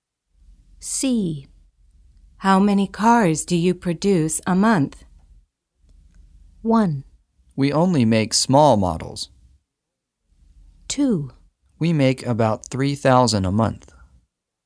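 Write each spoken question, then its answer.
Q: How many cars do you produce a month?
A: 2: We make about 3,000 a month.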